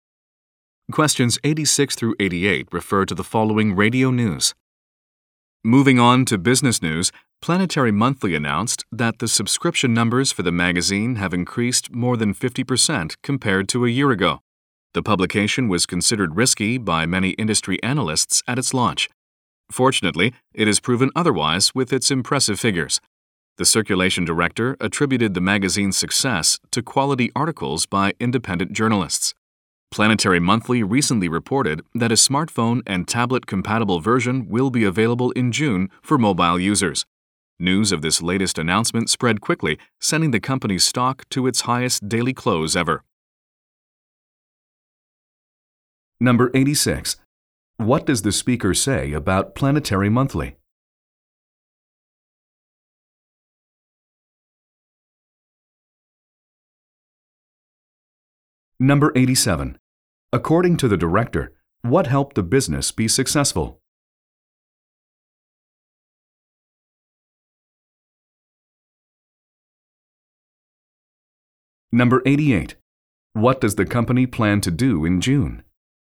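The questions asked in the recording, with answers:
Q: What does the speaker say about Planetary Monthly?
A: Its subscriptions have increased more than 50% from a year ago

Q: According to the director, what helped the business be successful?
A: Quality articles by independent journalists

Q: What does the company plan to do in June?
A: Release a version for smartphones and tablets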